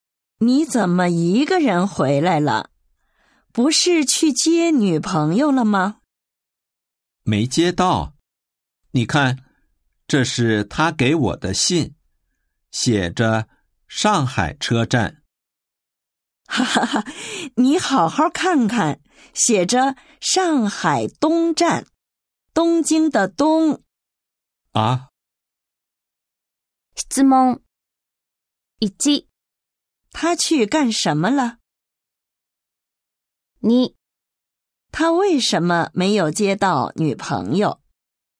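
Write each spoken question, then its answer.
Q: 他去干什么了?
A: 去接女朋友

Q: 他为什么没有接到女朋友?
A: 他去错了车站,应该去上海东站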